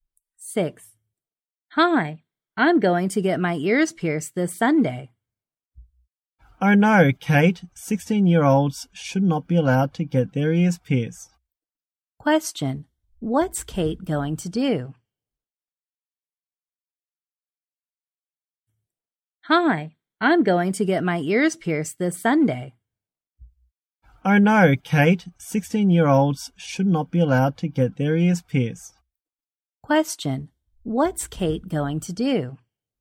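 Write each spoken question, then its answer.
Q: Question, what's Kate going to do?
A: Get her ears pierced this Sunday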